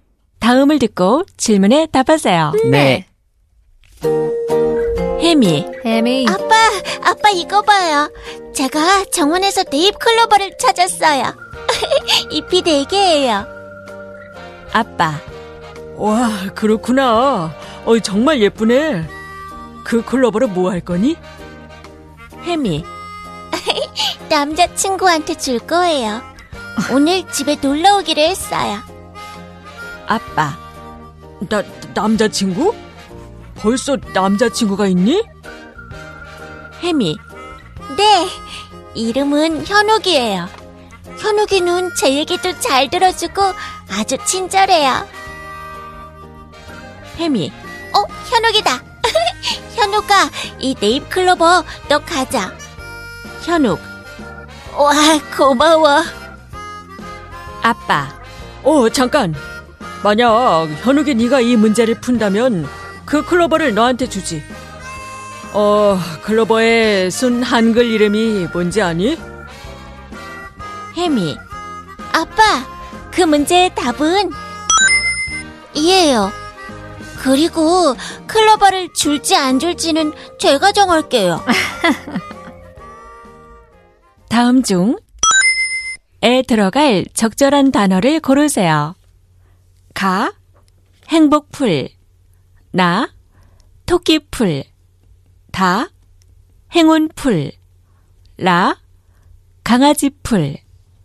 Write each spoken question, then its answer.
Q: 다음 중에 들어갈 적절한 단어를 고르세요.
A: It is Toki Boy!